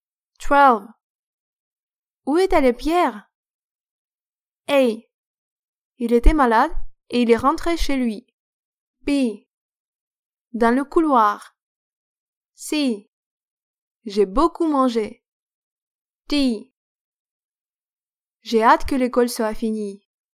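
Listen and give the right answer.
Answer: A: Il était malade et il est rentré chez lui.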